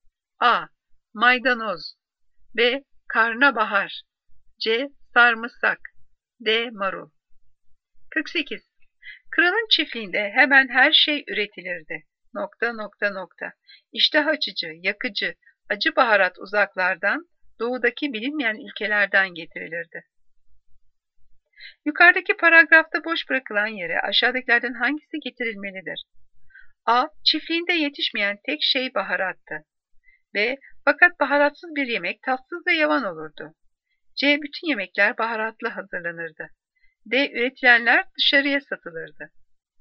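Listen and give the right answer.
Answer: A: Çiftliğinde yetişmeyen tek şey baharattı.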